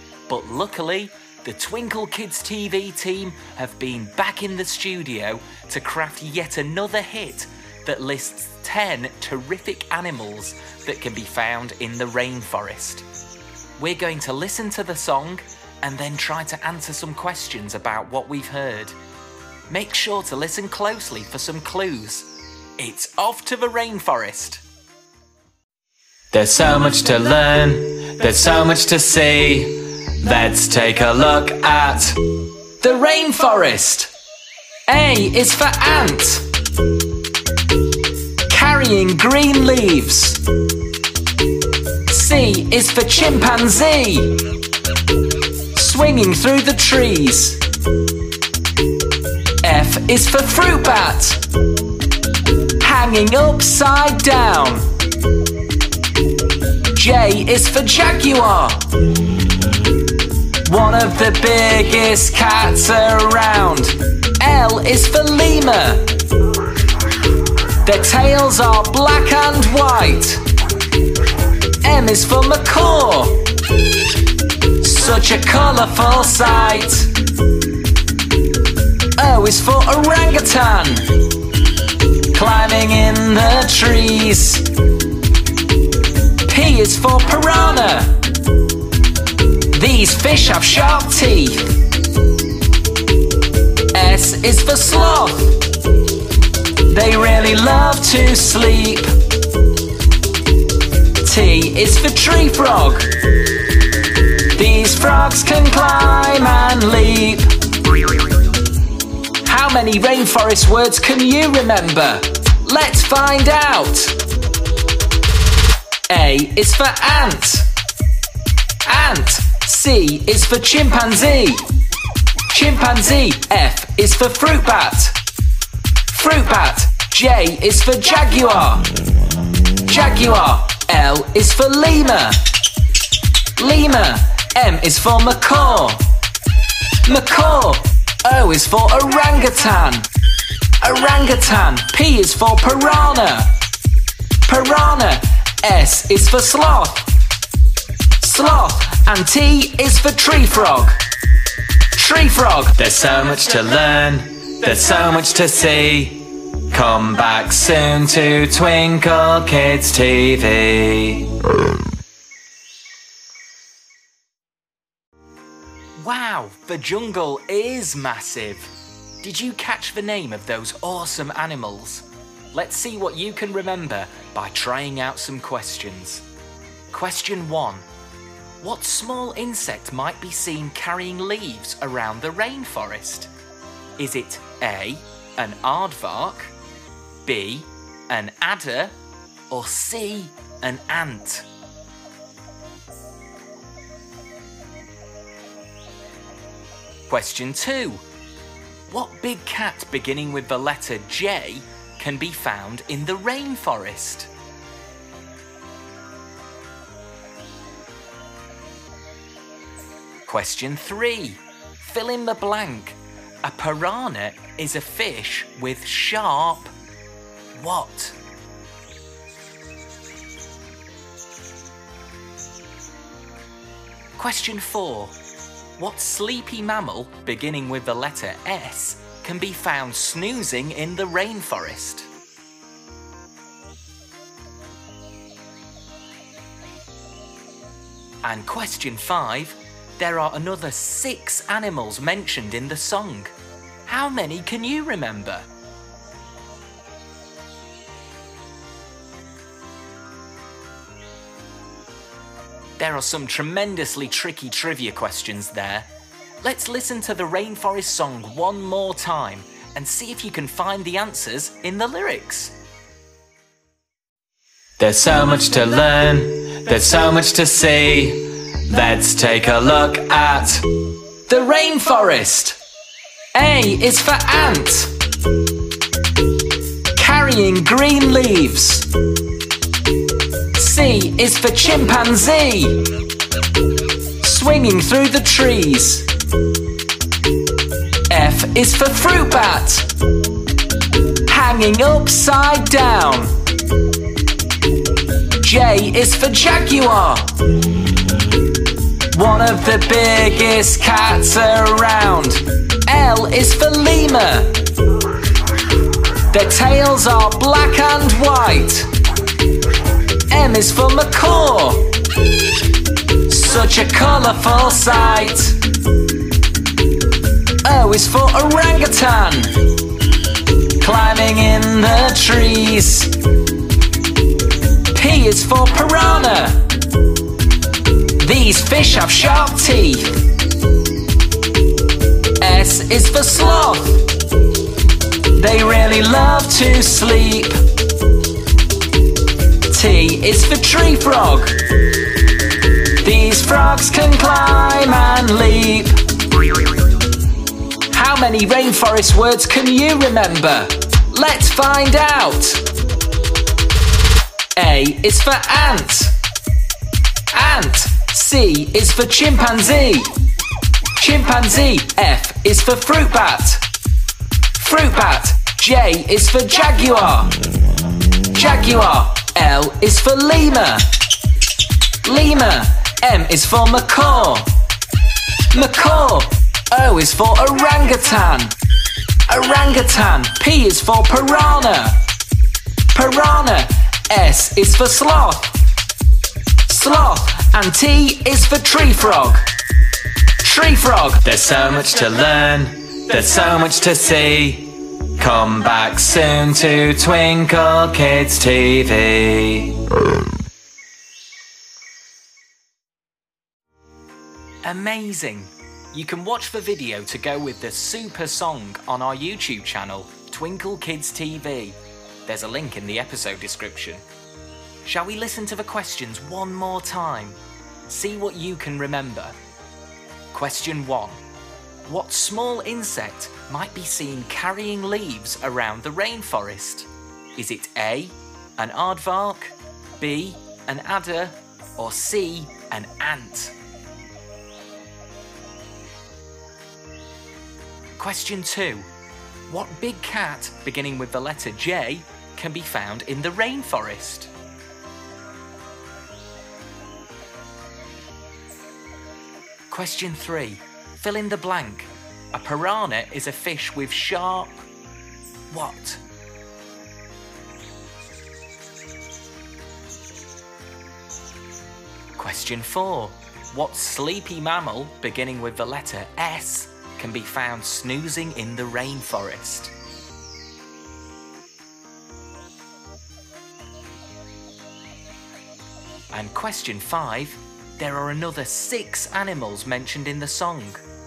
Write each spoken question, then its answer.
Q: What small insect might be seen carrying leaves around the rainforest?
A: The answer is C, an ant.

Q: What big cat, beginning with the letter J, can be found in the rainforest?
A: The answer is a jaguar.

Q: A piranha is a fish with sharp...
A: The answer is teeth.

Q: What sleepy mammal, beginning with the letter S, can be found snoozing in the rainforest?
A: The sleepy sloth is the answer.

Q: There are another 6 animals mentioned in the song. How many can you remember?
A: the other animals in the song are chimpanzee, fruit bat, lemur, macaw, orangutan, and tree frog.